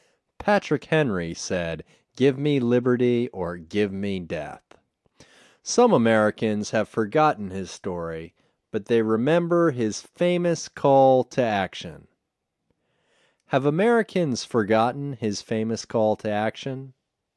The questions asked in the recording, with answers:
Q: Have Americans forgotten his famous call to action?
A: No. They haven't forgotten his famous call to action.